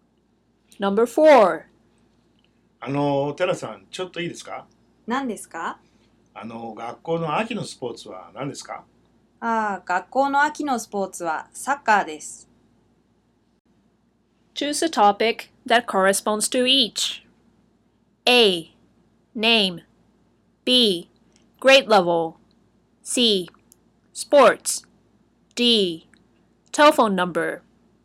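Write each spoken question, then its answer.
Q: Choose a topic that corresponds to each.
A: C: Sports.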